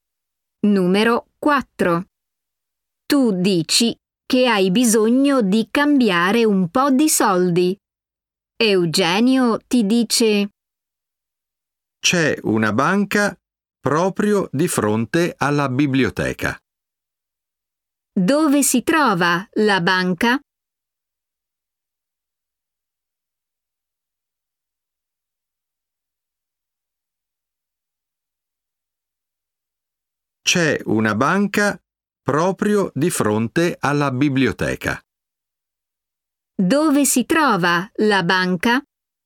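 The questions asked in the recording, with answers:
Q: Dove si trova la banca?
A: proprio di fronte alla biblioteca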